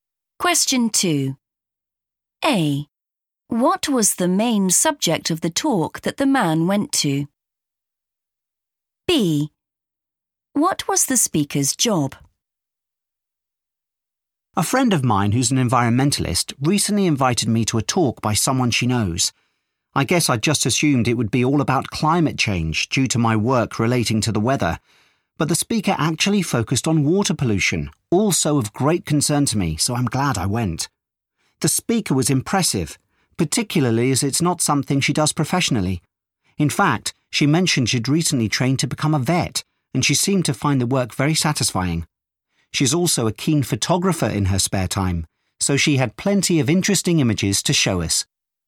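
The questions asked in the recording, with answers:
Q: What was the main subject of the talk that the man went to?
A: water pollution

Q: What was the speaker's job?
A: vet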